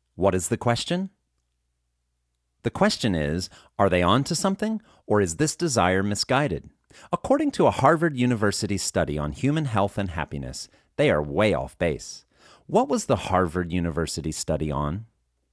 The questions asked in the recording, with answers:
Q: What was the Harvard University study on?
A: The Harvard University study was on human health and happiness.